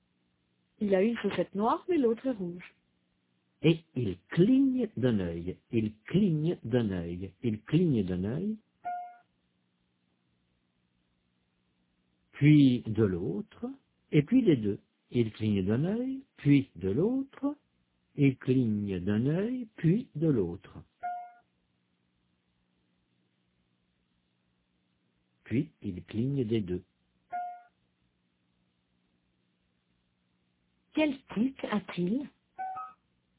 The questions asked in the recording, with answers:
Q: Quel tic a-t-il?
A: Il cligne d'un œil, puis de l'autre, puis des deux.